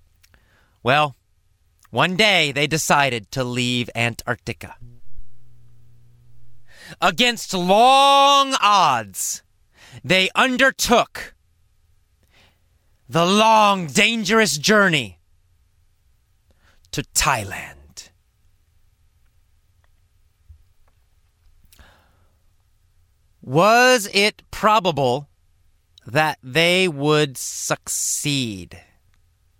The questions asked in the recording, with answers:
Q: Was it probable that they would succeed?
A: No, it was not probable. Probably they would fail.